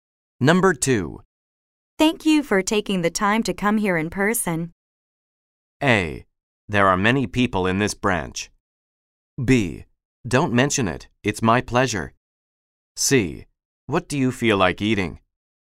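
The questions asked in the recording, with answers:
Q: Thank you for taking the time to come here in person.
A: B: Don't mention it. It's my pleasure.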